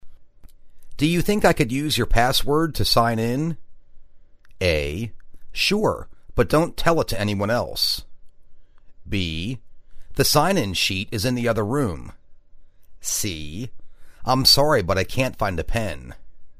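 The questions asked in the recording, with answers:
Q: Do you think I could use your password to sign in?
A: A: Sure, but don't tell it to anyone else.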